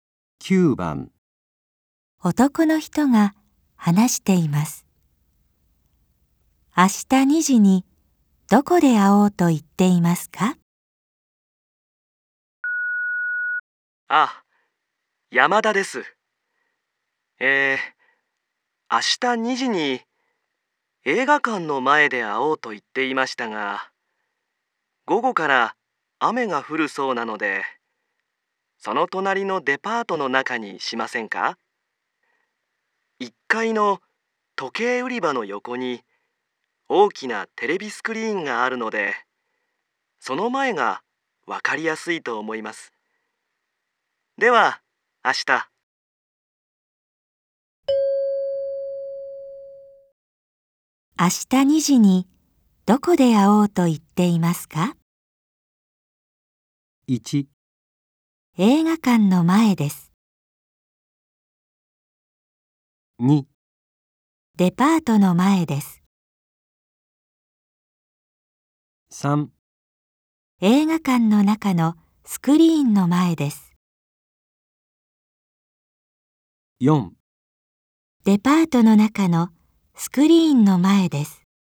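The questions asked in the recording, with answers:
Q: 明日2時にどこで会おうと言っていますか?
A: 4: デパートの中のスクリーンの前です。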